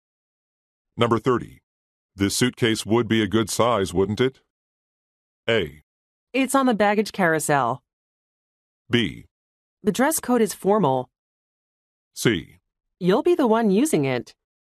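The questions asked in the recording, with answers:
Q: This suitcase would be a good size, wouldn't it?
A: C: You'll be the one using it.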